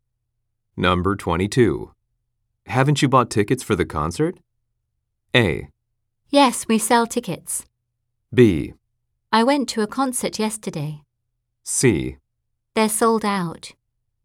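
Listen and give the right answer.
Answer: C: They're sold out.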